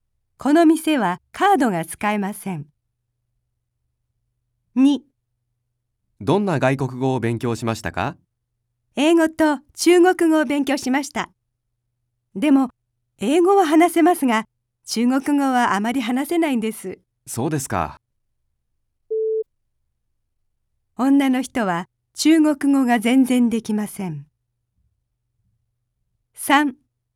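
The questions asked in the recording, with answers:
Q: 女の人は中国語が全然できません。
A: ×(間違い)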